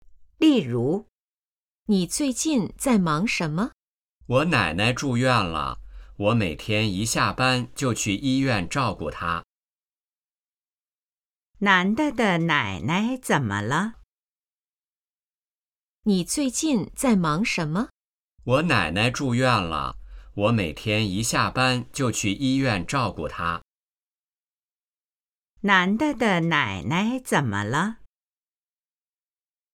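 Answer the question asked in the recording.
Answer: 住院了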